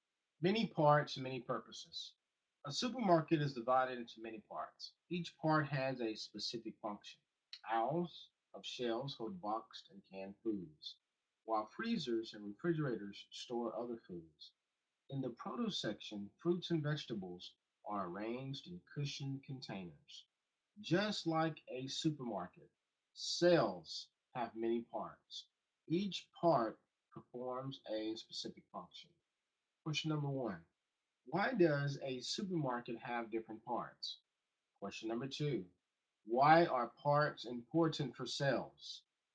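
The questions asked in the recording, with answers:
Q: why does a supermarket have different parts?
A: Each part has a specific function.

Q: why are parts important for cells?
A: Each part performs a specific function.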